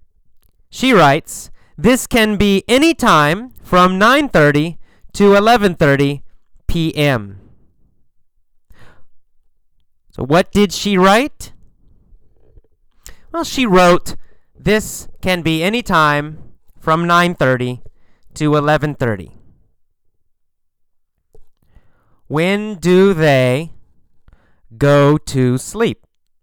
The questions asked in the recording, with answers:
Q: When do they go to sleep?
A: Oh, well, anytime from 9:30 to 11:30.